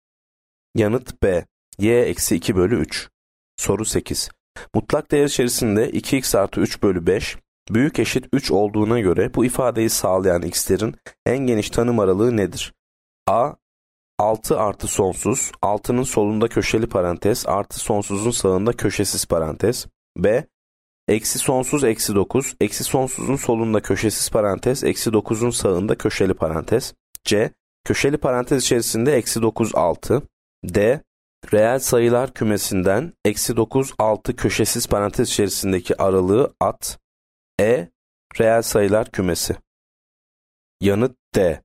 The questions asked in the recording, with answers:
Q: Mutlak değer içerisinde 2x artı 3 bölü 5, büyük eşit 3 olduğuna göre bu ifadeyi sağlayan x'lerin en geniş tanım aralığı nedir?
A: Yanıt D.